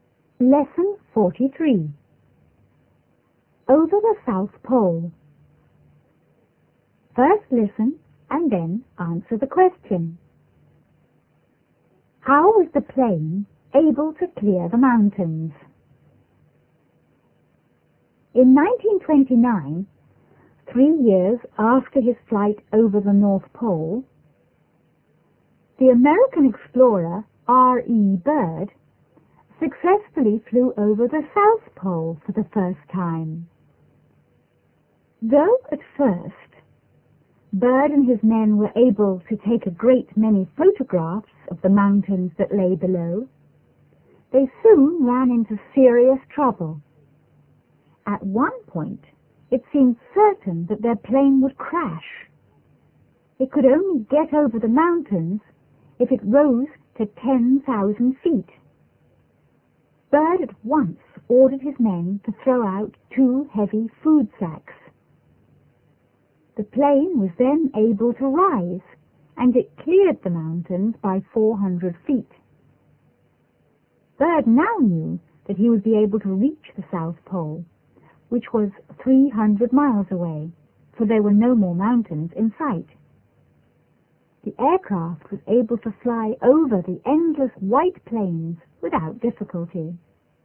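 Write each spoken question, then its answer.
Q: How was the plane able to clear the mountains?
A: Byrd ordered his men to throw out two heavy food sacks, so the plane could rise.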